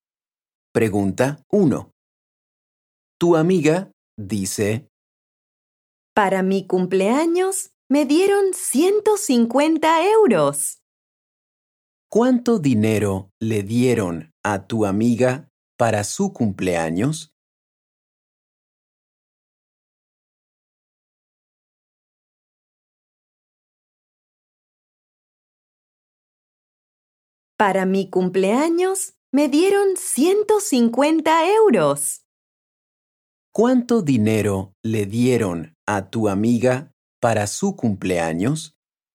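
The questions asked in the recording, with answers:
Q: ¿Cuánto dinero le dieron a tu amiga para su cumpleaños?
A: 150 euros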